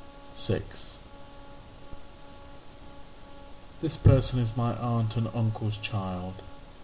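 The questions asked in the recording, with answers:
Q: This person is my aunt and uncle's child.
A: cousin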